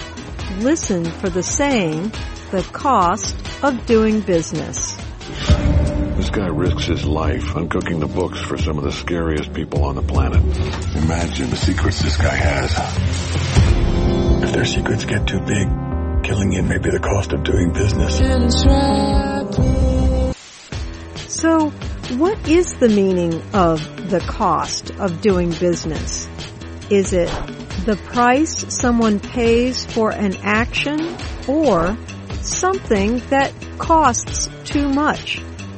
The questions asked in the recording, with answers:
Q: So, what is the meaning of the cost of doing business?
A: The cost of doing business means the price you pay for an action.